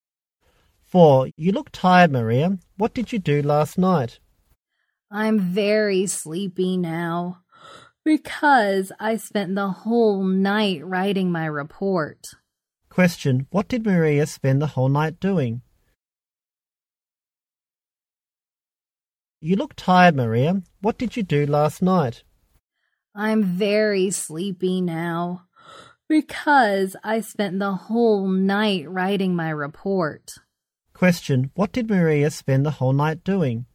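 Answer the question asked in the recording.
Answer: Writing her report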